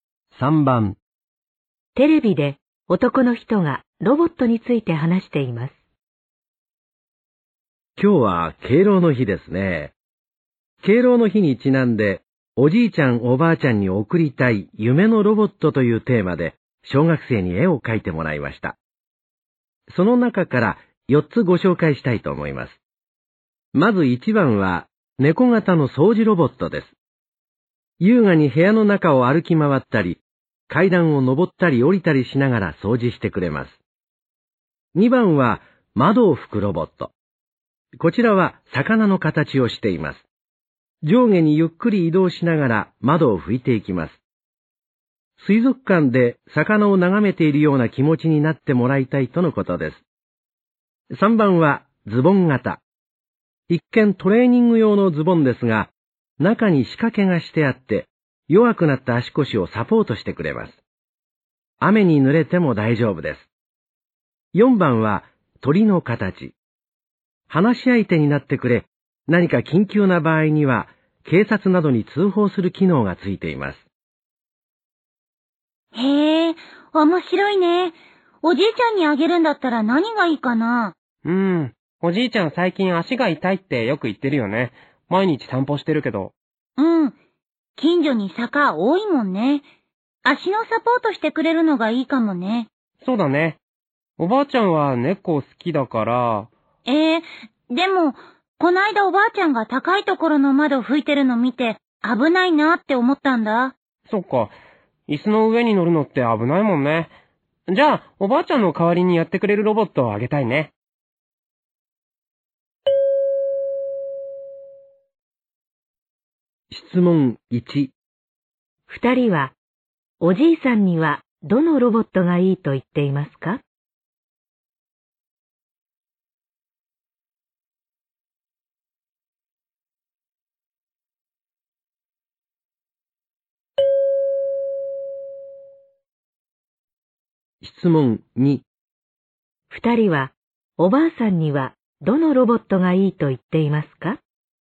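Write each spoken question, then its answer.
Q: 二人は、おじいさんにはどのロボットがいいと言っていますか?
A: 3: ズボン型のロボット

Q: 二人は、おばあさんには、どのロボットがいいと言っていますか?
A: 2: 窓を拭くロボット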